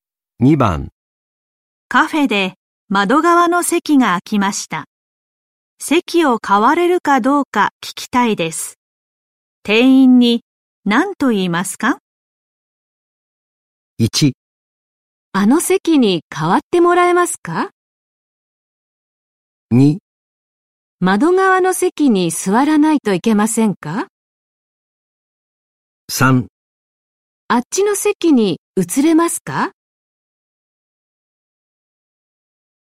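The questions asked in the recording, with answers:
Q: 店員に何と言いますか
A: 3: あっちの席に移れますか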